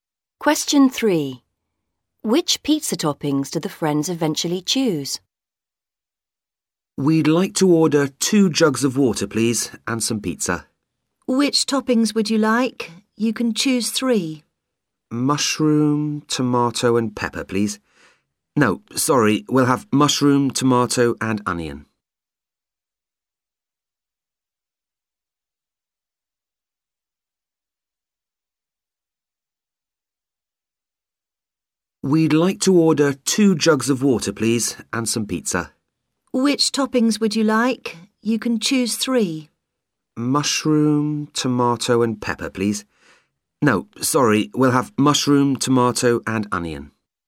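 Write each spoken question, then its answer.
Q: Which pizza toppings do the friends eventually choose?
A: Mushroom, tomato and onion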